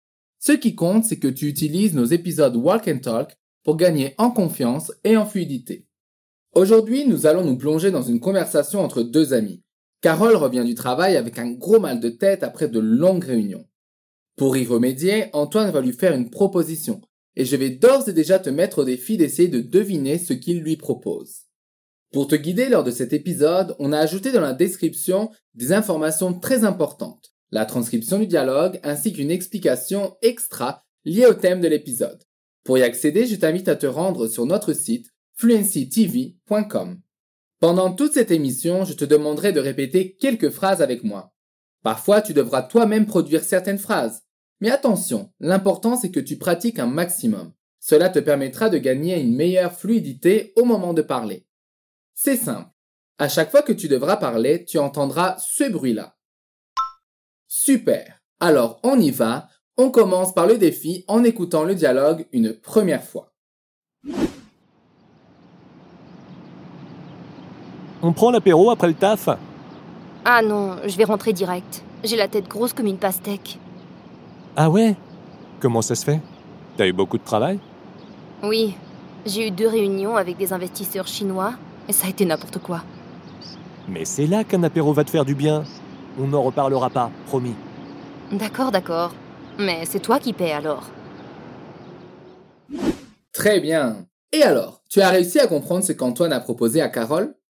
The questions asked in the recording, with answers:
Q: Et alors, tu as réussi à comprendre ce qu'Antoine a proposé à Carole?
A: une proposition assez alléchante qui est « On prend l'apéro après le taf ?»